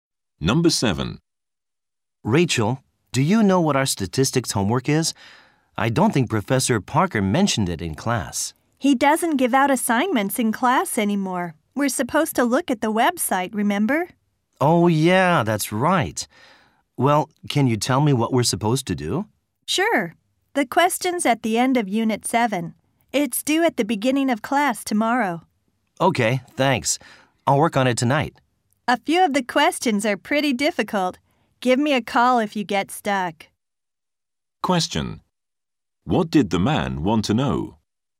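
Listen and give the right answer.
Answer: What the statistics homework is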